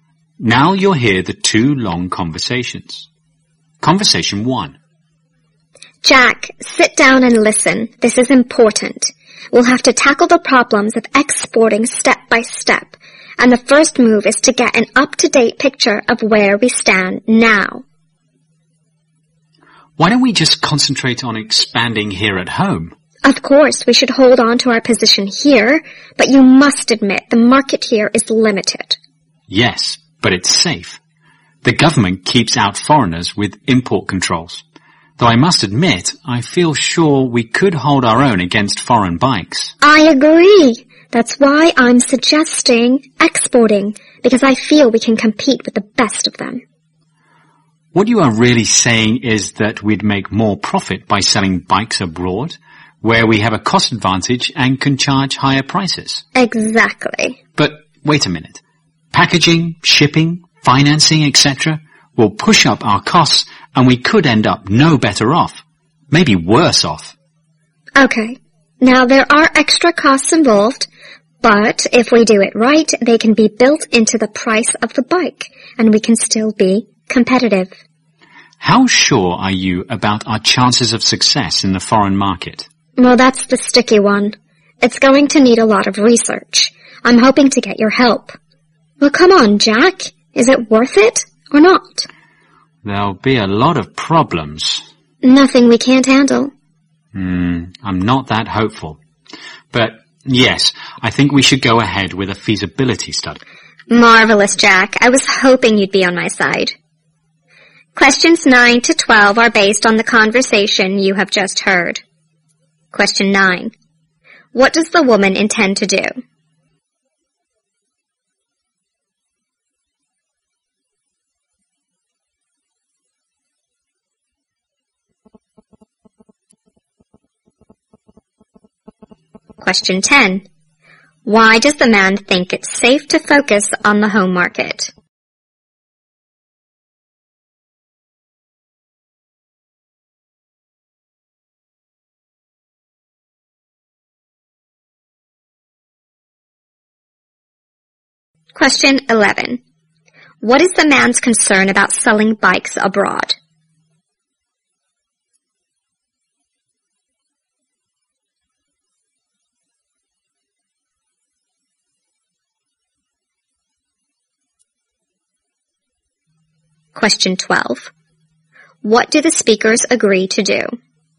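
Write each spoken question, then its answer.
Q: What does the woman intend to do?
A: Export bikes and sell them abroad

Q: Why does the man think it's safe to focus on the home market?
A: Because the government uses import controls to keep out foreign competitors

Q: What is the man's concern about selling bikes abroad?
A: Extra costs like packaging, shipping and financing may push costs up and cancel out the profit

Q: What do the speakers agree to do?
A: Carry out a feasibility study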